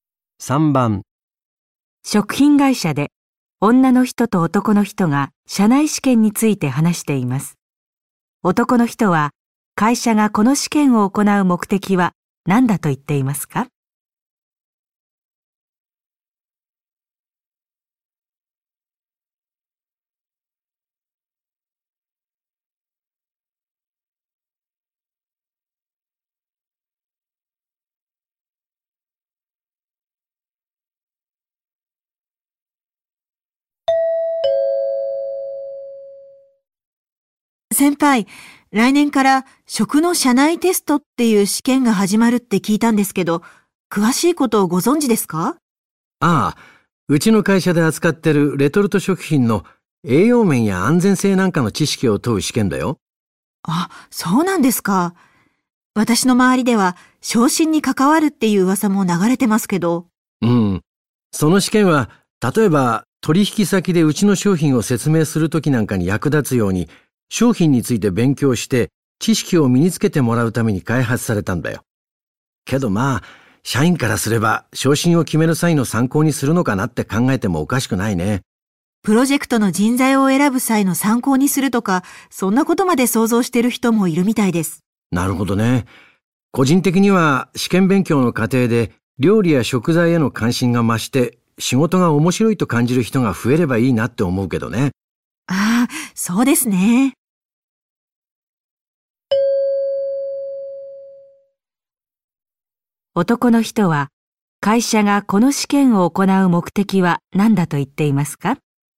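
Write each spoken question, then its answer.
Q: 男の人は会社がこの試験を行う目的は何だと言っていますか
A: 社員に商品についての知識を身につけてもらうため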